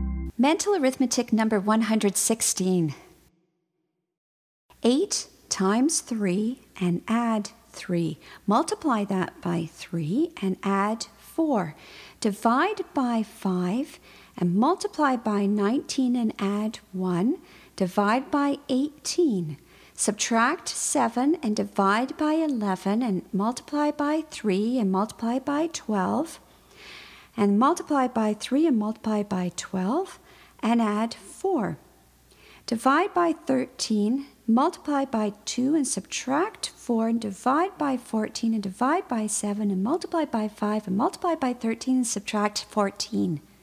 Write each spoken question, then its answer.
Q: 8 times 3 and add 3. Multiply that by 3 and add 4. Divide by 5 and multiply by 19 and add 1. Divide by 18. Subtract 7 and divide by 11 and multiply by 3 and multiply by 12. And multiply by 3 and multiply by 12 and add 4. Divide by 13, multiply by 2 and subtract 4 and divide by 14 and divide by 7 and multiply by 5 and multiply by 13 and subtract 14.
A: And the answer is 116.